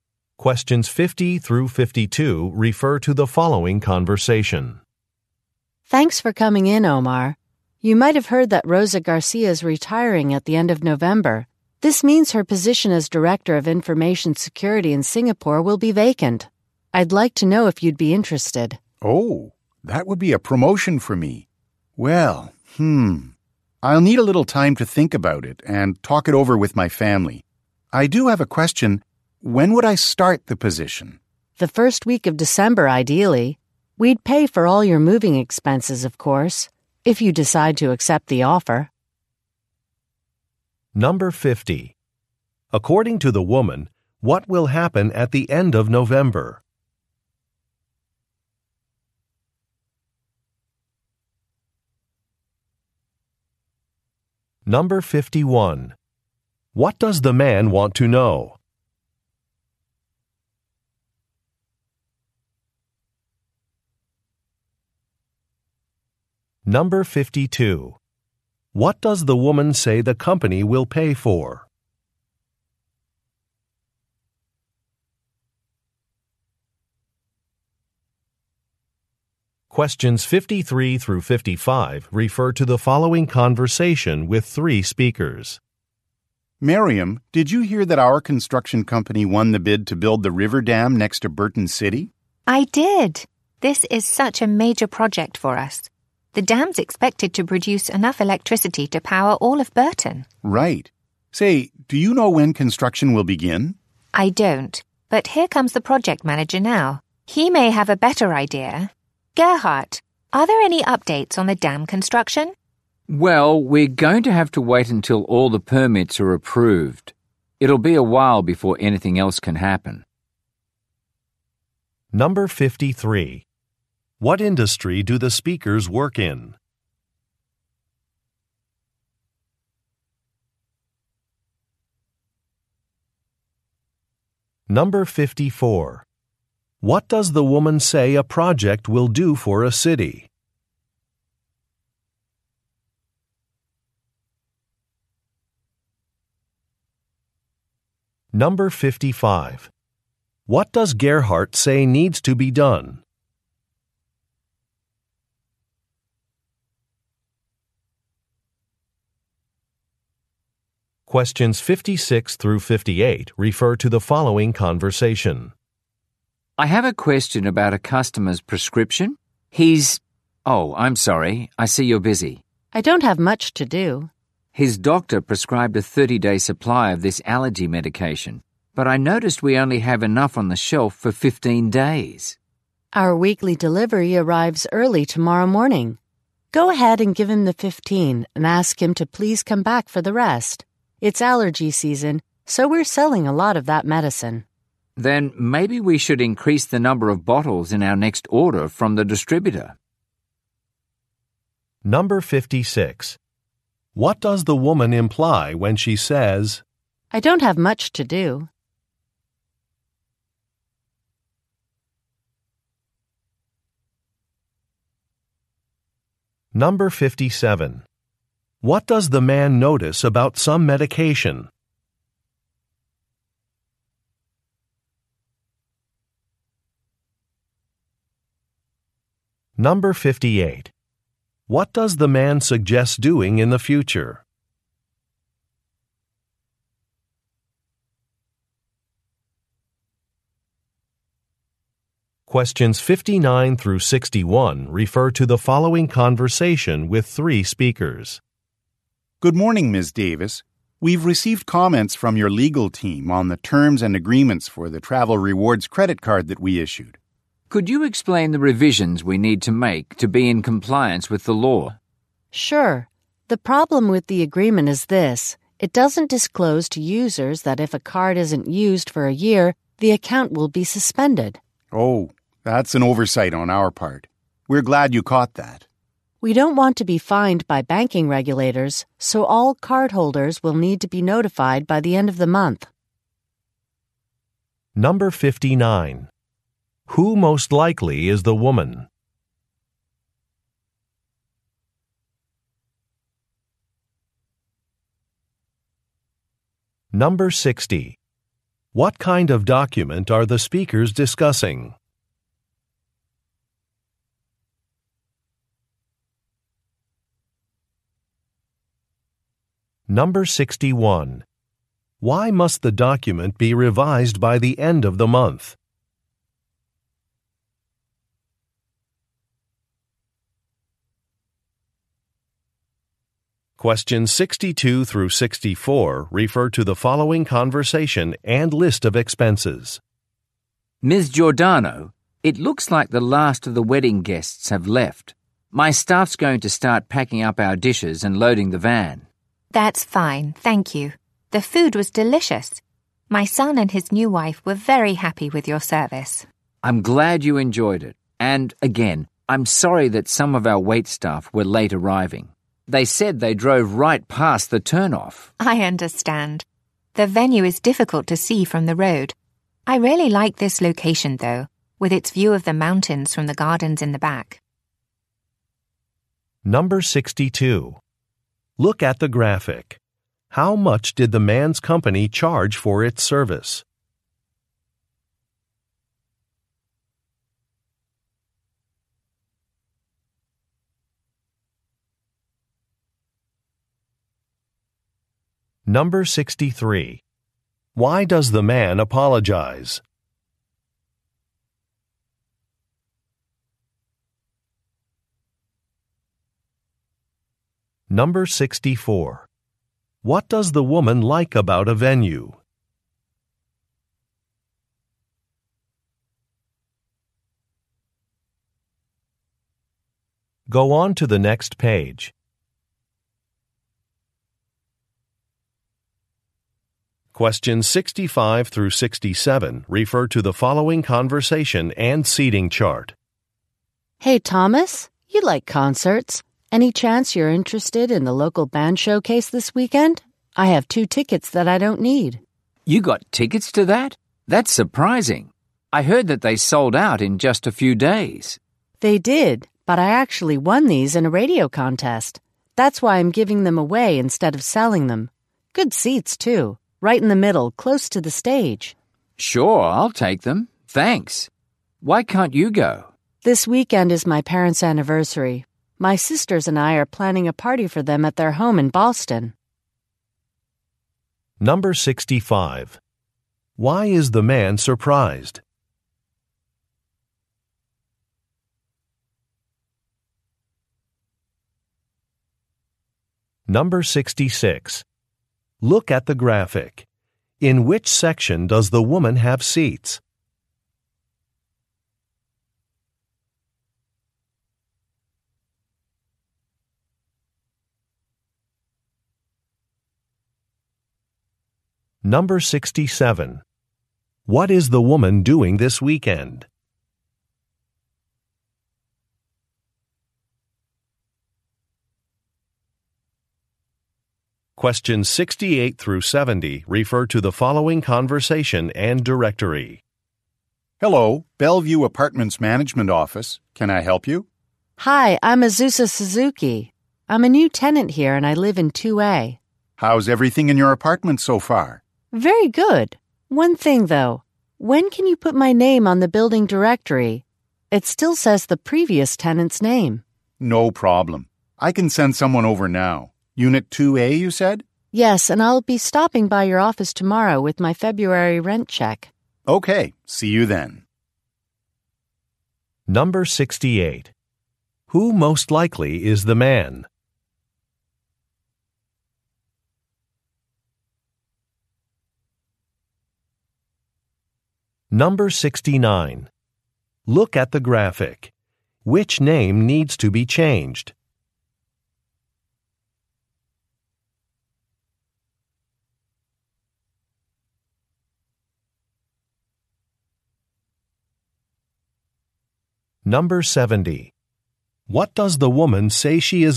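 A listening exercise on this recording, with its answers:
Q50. According to the woman, what will happen at the end of November?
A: A colleague will retire

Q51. What does the man want to know?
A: When he would start the position

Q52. What does the woman say the company will pay for?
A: Moving expenses

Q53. What industry do the speakers work in?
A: Construction

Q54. What does the woman say a project will do for a city?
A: Provide electricity for the whole city

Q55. What does Gerhard say needs to be done?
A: Permits need to be approved

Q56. What does the woman imply when she says, "I don't have much to do"?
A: She has time to help

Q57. What does the man notice about some medication?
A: There is not enough in stock

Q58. What does the man suggest doing in the future?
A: Ordering more of the medicine

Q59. Who most likely is the woman?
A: A lawyer

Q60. What kind of document are the speakers discussing?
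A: A credit card agreement

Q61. Why must the document be revised by the end of the month?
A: To avoid being fined by regulators

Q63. Why does the man apologize?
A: Some staff arrived late

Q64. What does the woman like about a venue?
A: The view of the mountains

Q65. Why is the man surprised?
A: The tickets had sold out quickly

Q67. What is the woman doing this weekend?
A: Attending her parents' anniversary party

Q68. Who most likely is the man?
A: A building management employee

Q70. What does the woman say she is going to do tomorrow?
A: Drop off her rent check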